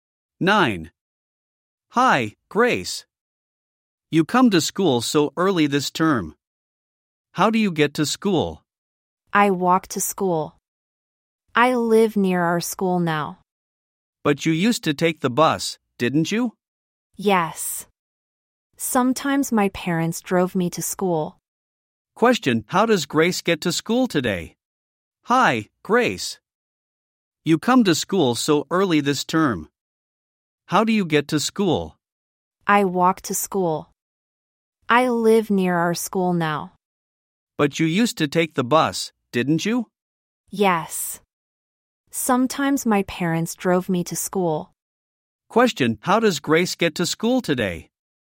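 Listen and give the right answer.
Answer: She walks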